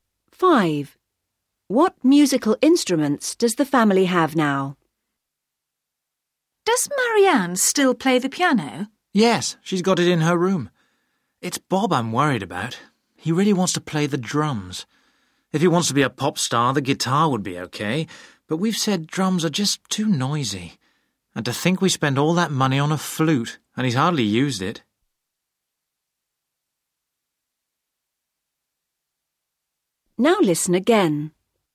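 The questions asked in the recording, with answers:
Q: What musical instruments does the family have now?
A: A piano and a flute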